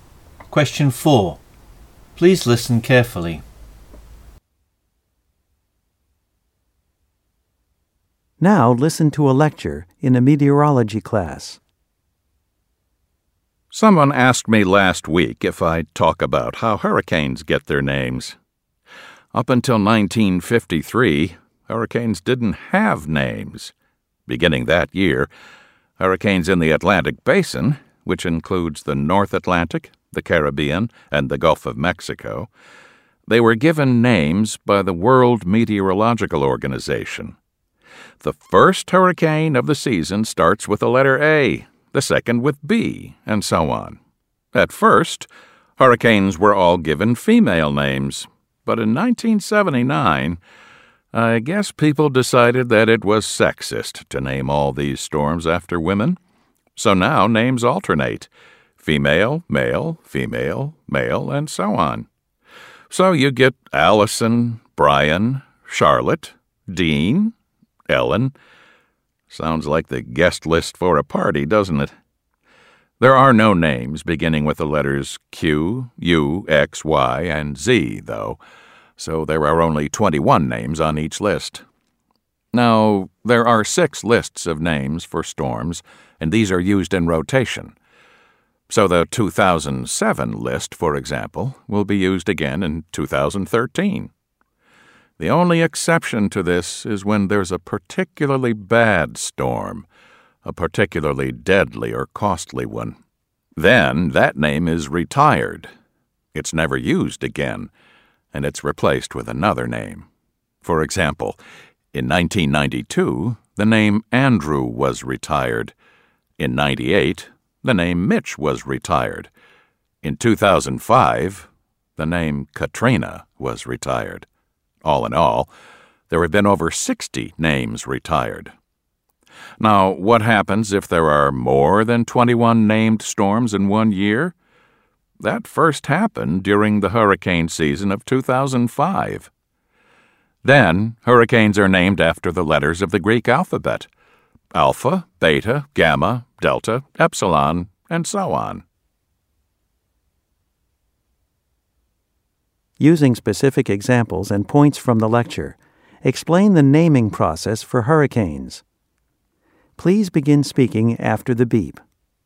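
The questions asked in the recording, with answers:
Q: Using specific examples and points from the lecture, explain the naming process for hurricanes.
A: Since 1953 the World Meteorological Organization names Atlantic hurricanes in alphabetical order (no Q, U, X, Y, Z, so 21 names); since 1979 female and male names alternate; six lists rotate (2007 list reused in 2013); names of very deadly or costly storms are retired (e.g., Andrew, Mitch, Katrina); if there are more than 21 storms, Greek letters are used (first in 2005).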